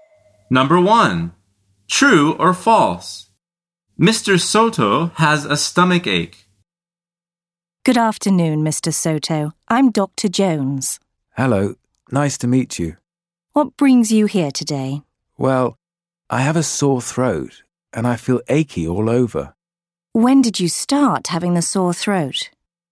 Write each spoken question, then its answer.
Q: True or false? Mr. Soto has a stomach ache.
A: The answer is false.